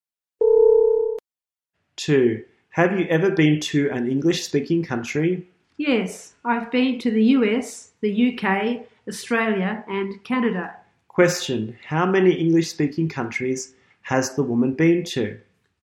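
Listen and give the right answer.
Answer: Four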